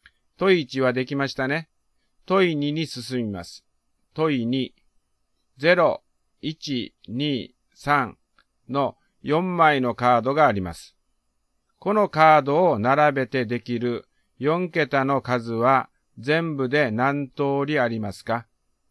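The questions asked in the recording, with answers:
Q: 0、1、2、3の4枚のカードがあります。このカードを並べてできる4桁の数は全部で何通りありますか?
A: 18通り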